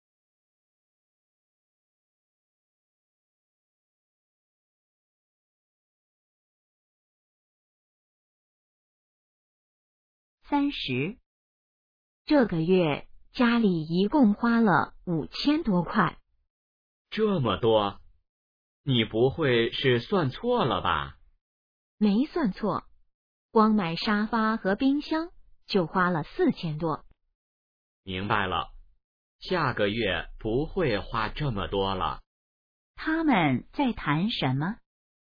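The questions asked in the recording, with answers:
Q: 他们在谈什么?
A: 这个月家里花的钱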